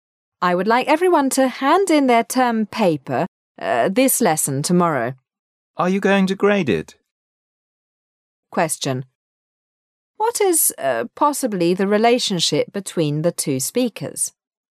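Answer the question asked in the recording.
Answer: Teacher and student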